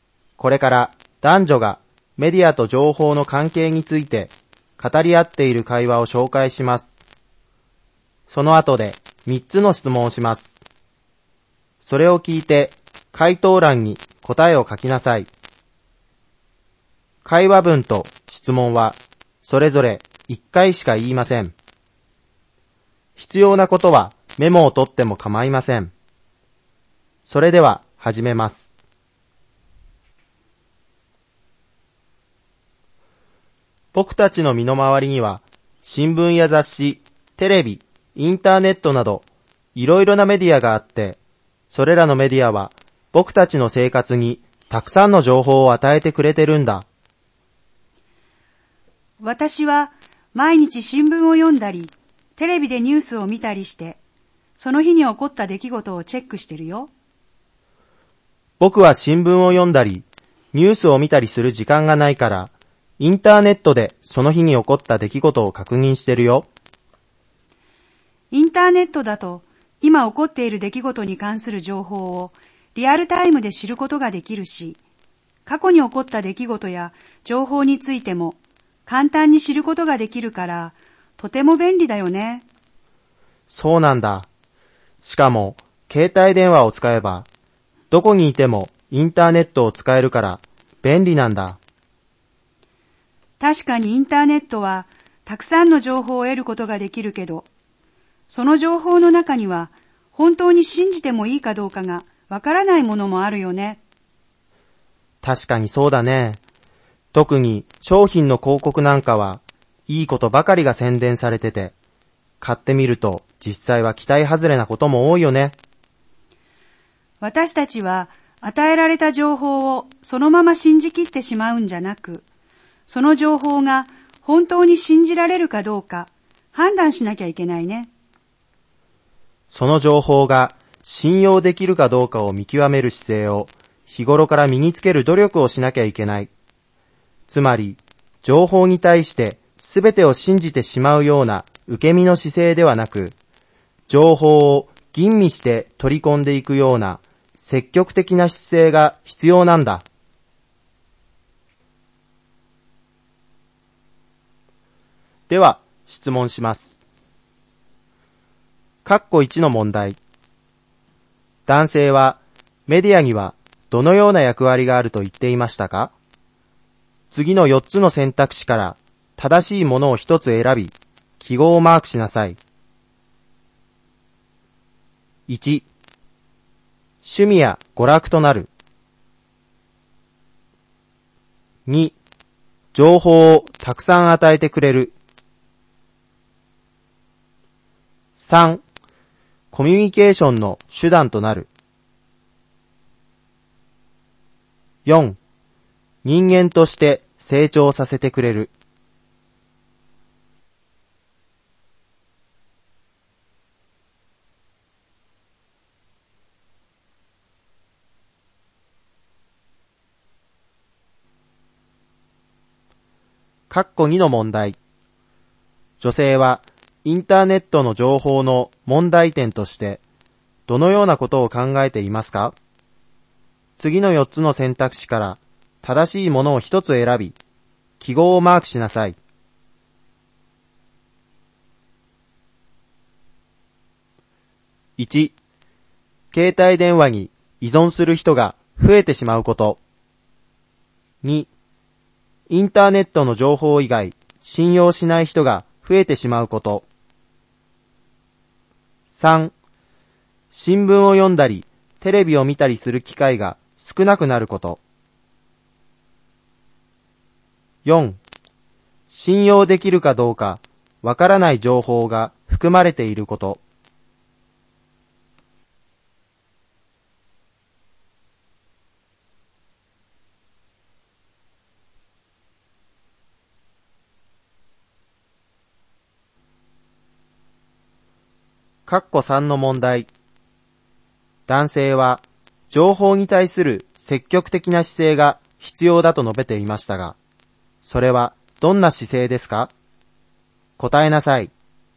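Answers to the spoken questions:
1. 2: 情報をたくさん与えてくれる。
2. 4: 信用できるかどうかわからない情報が含まれていること。
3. 情報を吟味して取り込んでいく姿勢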